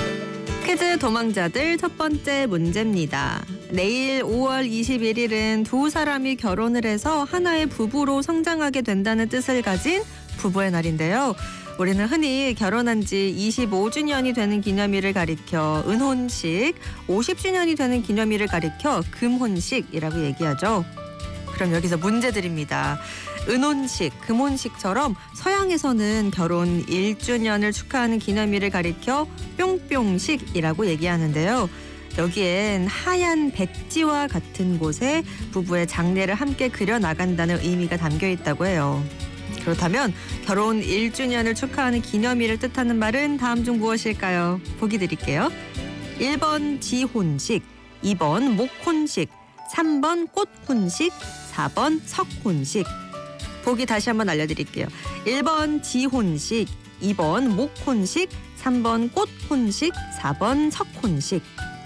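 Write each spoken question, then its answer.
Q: 그렇다면 결혼 1주년을 축하하는 기념일을 뜻하는 말은 다음 중 무엇일까요?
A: 1: 지혼식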